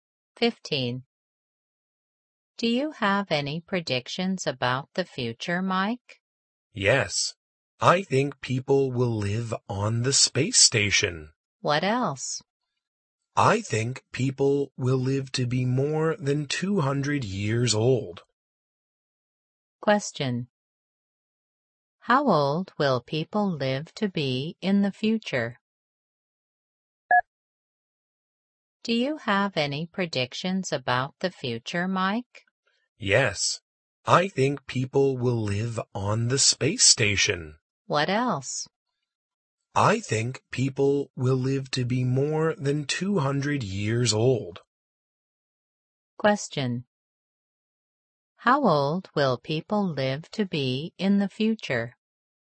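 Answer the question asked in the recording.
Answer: More than 200 years old.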